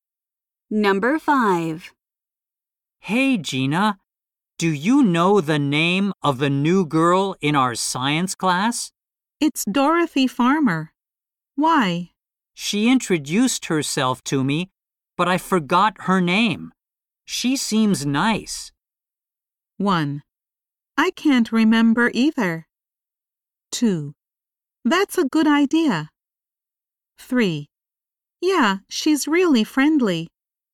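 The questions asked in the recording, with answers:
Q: She seems nice.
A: 3: Yeah, she's really friendly.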